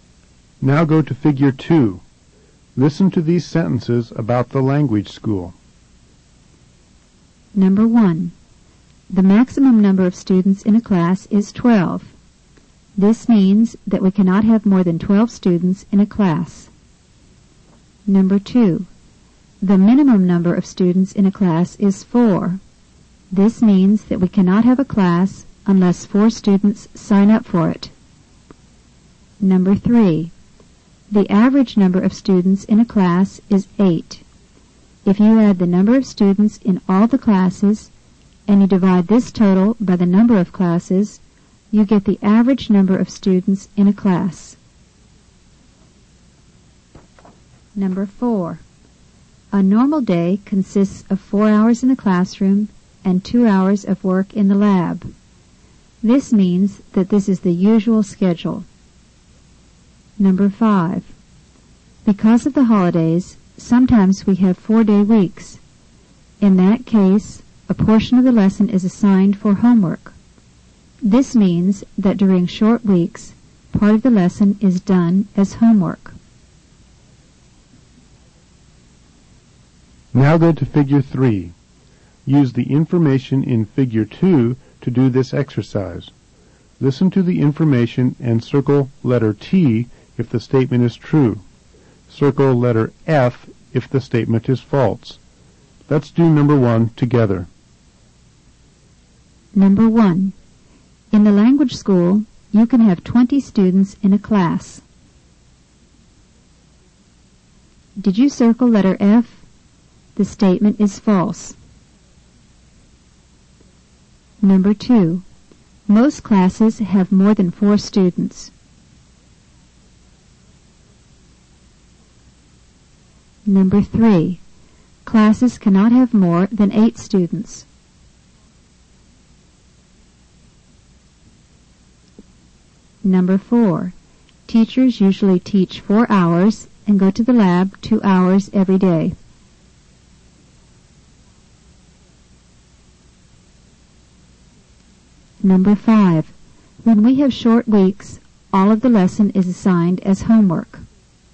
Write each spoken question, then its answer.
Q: Most classes have more than 4 students.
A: Number 2 is true.

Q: Classes cannot have more than 8 students.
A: Number 3 is false.

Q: Teachers usually teach 4 hours and go to the lab 2 hours every day.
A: Number 4 is true.

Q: When we have short weeks, all of the lesson is assigned as homework.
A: Number 5 is false.